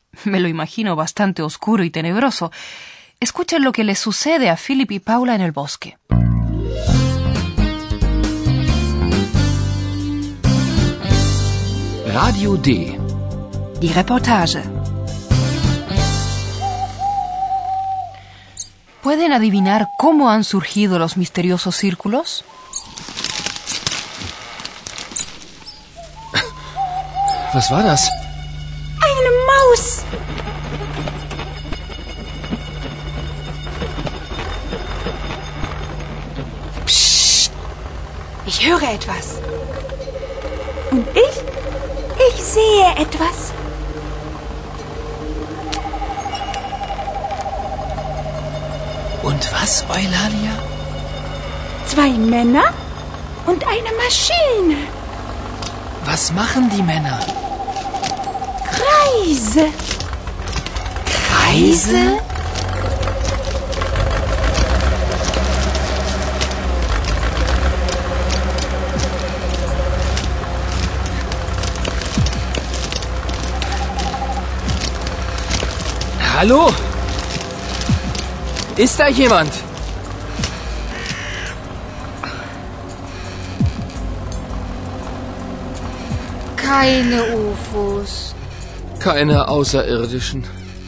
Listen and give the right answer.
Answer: Dos hombres, suponemos que son dos agricultores de aquel pueblo, han cortado círculos en el grano con una máquina.